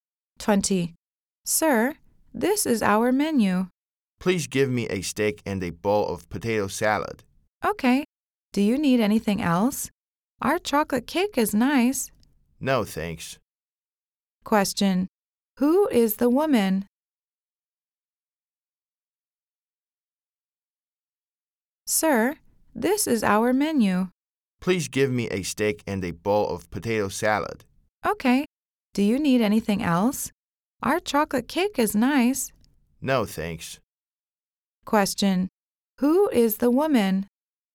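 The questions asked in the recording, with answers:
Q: Question. Who is the woman?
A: A waitress.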